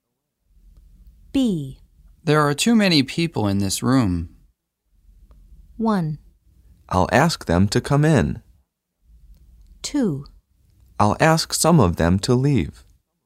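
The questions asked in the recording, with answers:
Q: There are too many people in this room.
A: 2: I'll ask some of them to leave.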